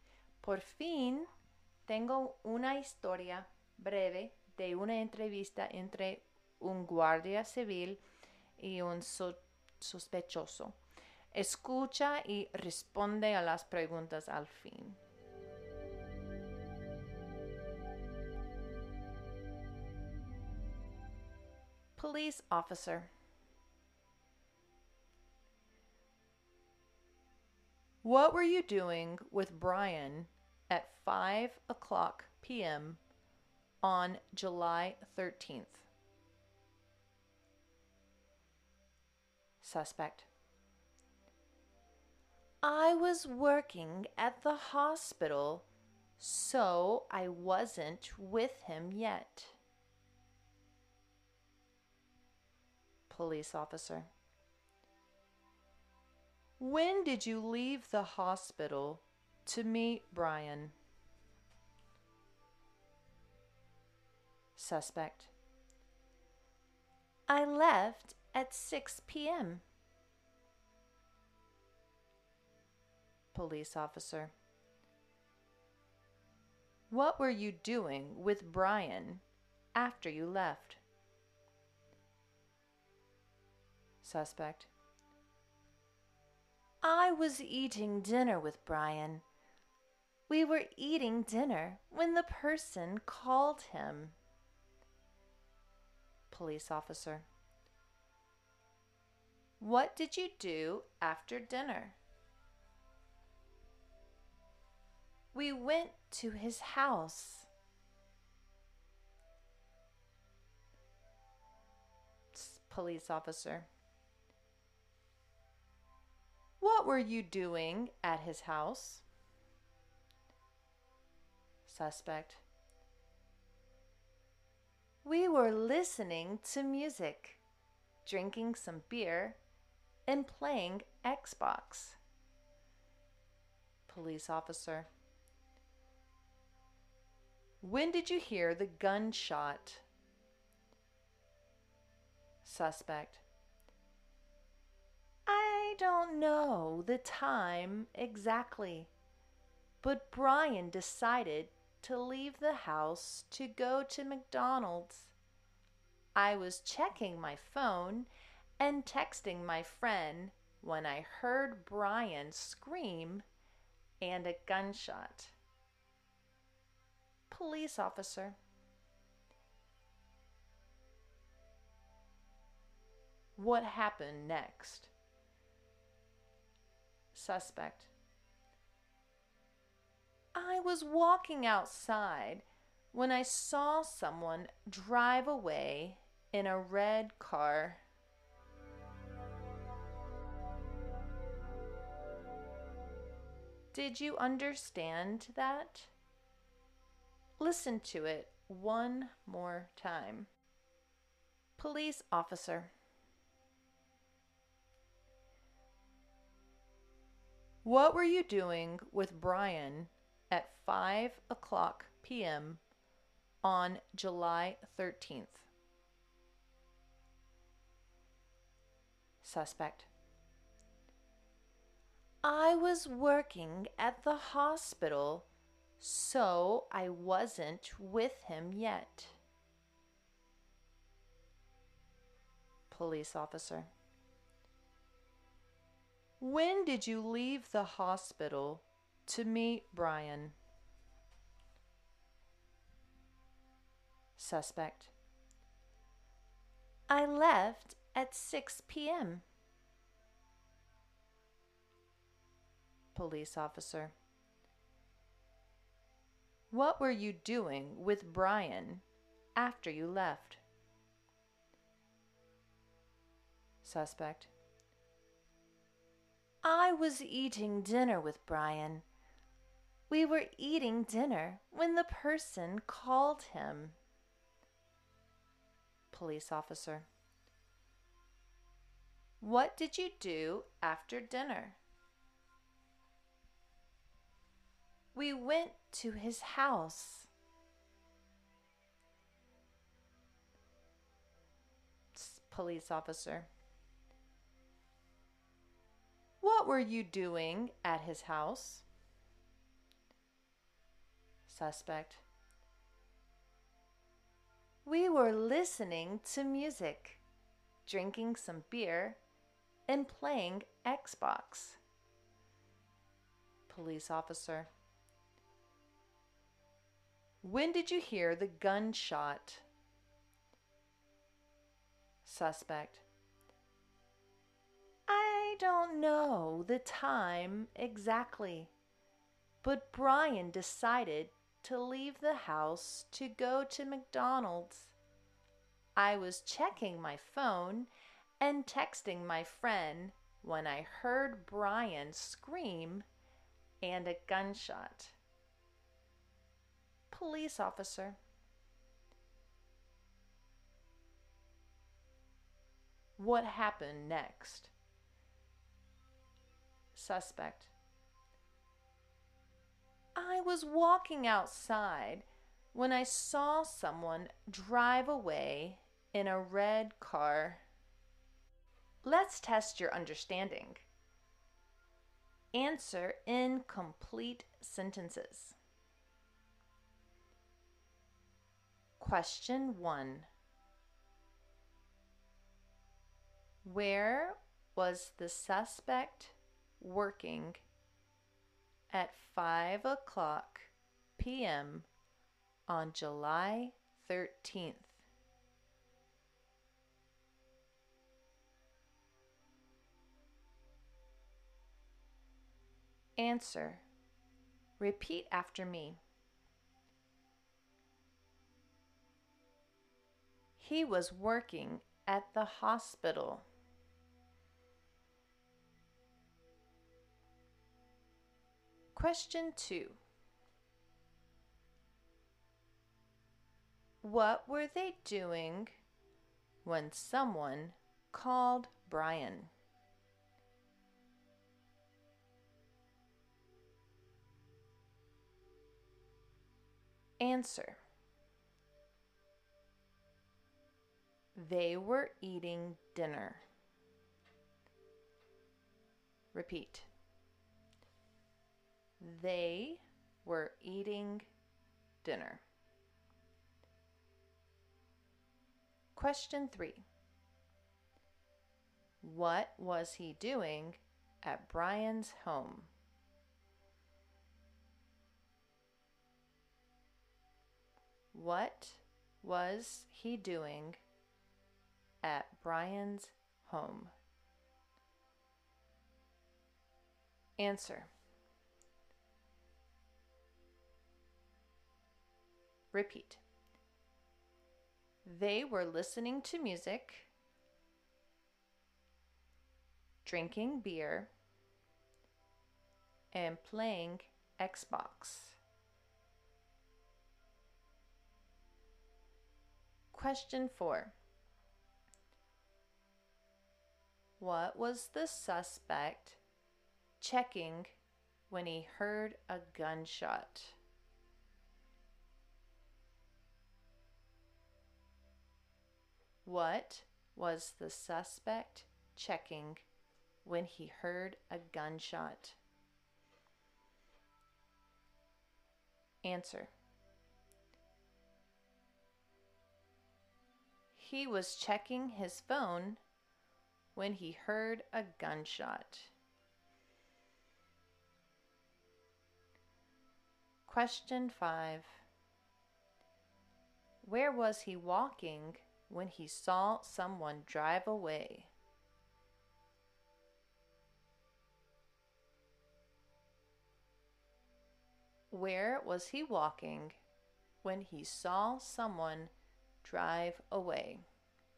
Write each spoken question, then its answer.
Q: Where was the suspect working?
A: He was working at the hospital.

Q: What were they doing when someone called Brian?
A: They were eating dinner.

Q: What was he doing at Brian's home?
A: They were listening to music,

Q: What was the suspect checking when he heard a gunshot?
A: He was checking his phone when he heard a gunshot.

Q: Where was he walking when he saw someone drive away?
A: He was walking outside when he saw someone drive away.